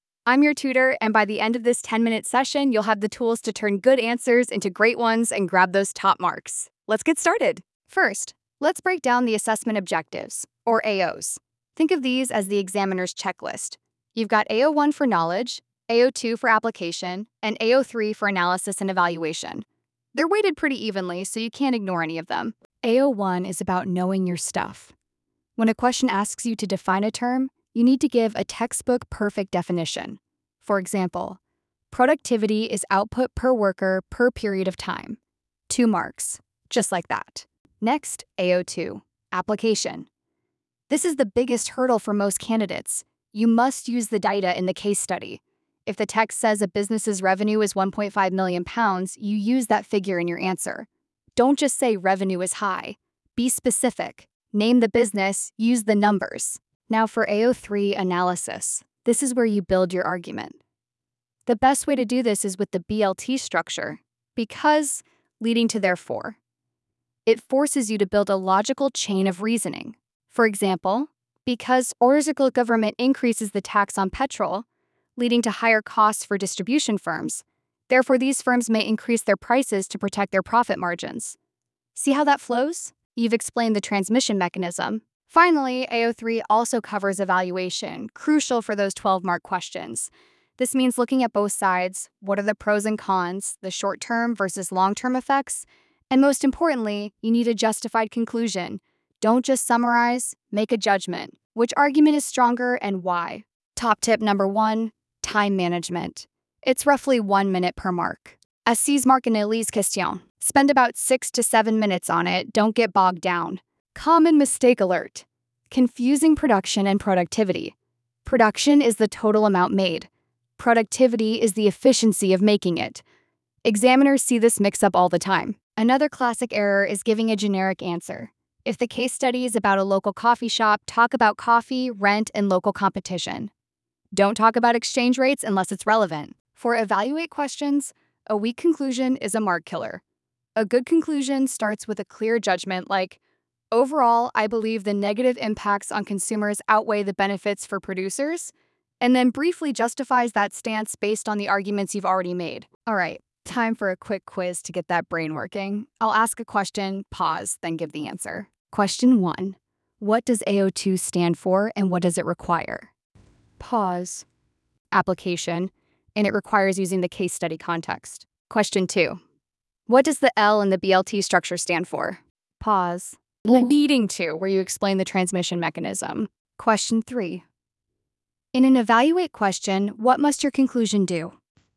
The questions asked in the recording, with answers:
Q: what does AO2 stand for and what does it require?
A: Application, and it requires using the case study context.

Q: in an evaluate question, what must your conclusion do?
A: Make a justified judgment, not just a summary.